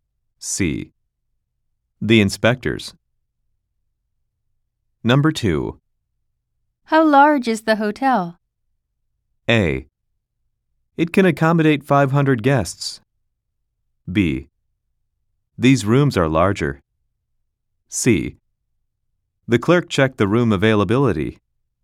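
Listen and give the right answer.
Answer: A: It can accommodate 500 guests.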